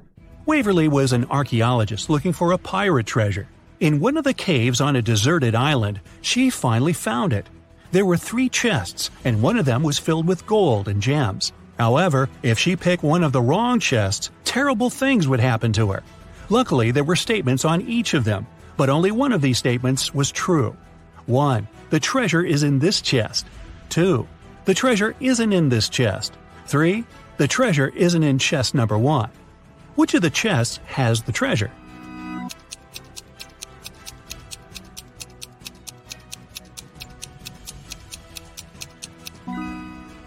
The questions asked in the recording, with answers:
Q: Which of the chests has the treasure?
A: Now, there's no contradictions, and the treasure is in the second chest.